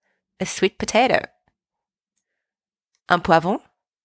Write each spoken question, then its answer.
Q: Un poivron.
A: A pepper.